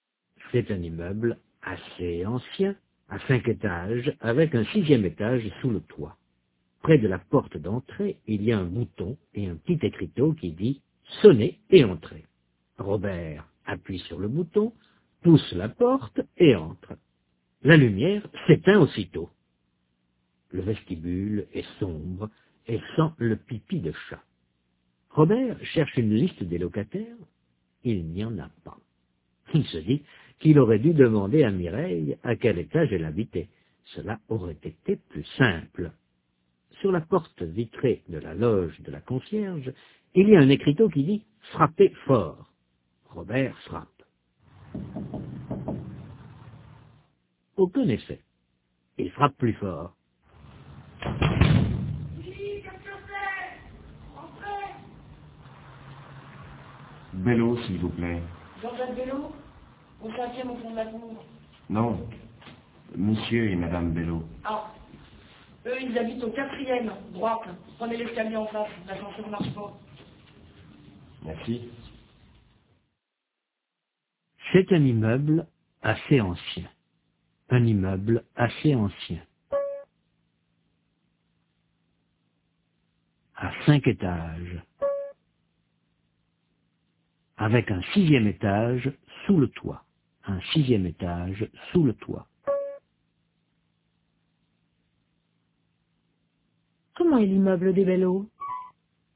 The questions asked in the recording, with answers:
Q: Comment est l'immeuble des Bellot?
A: Assez ancien, à 5 étages.